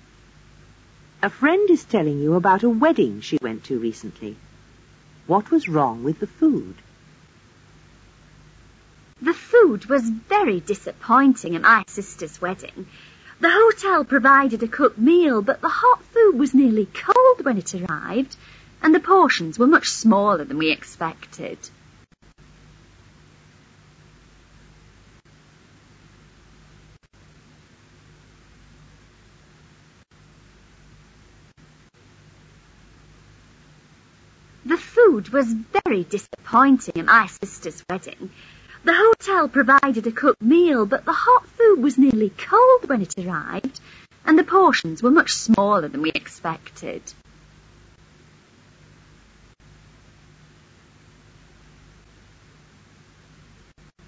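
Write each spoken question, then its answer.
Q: What was wrong with the food?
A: The hot food was nearly cold and the portions were too small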